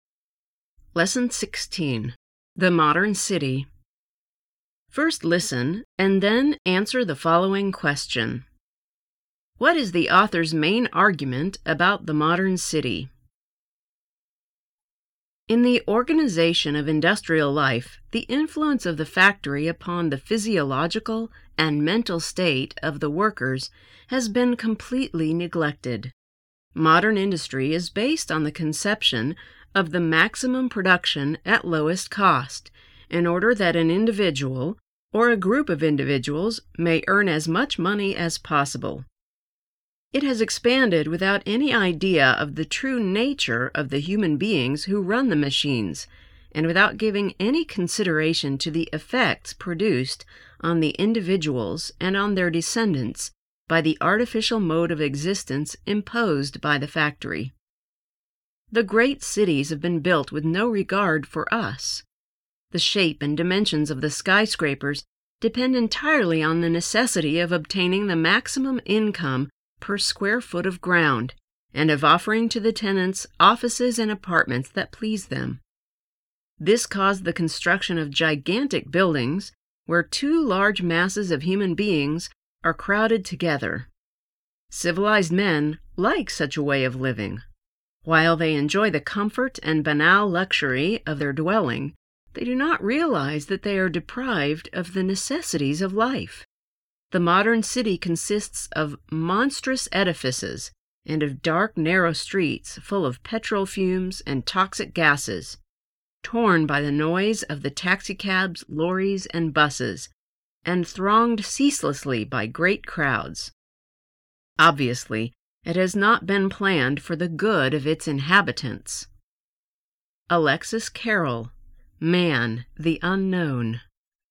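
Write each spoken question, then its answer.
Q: What is the author's main argument about the modern city?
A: The modern city was built for maximum profit with no regard for the health and well-being of its inhabitants.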